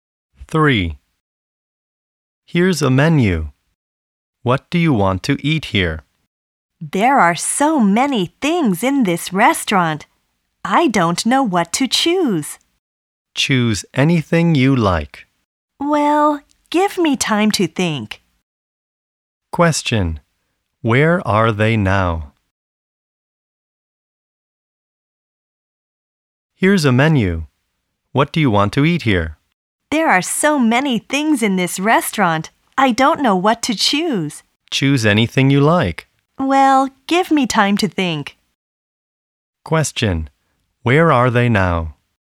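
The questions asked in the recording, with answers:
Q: Where are they now?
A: In a restaurant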